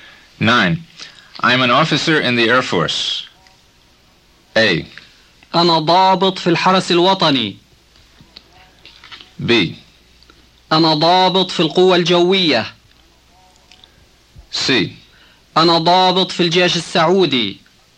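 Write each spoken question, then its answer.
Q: I'm an officer in the Air Force.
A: B: أنا ضابط في القوة الجوية.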